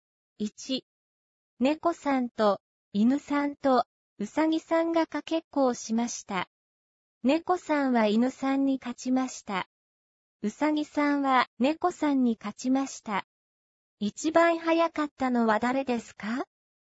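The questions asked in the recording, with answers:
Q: 一番早かったのは誰ですか?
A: うさぎさん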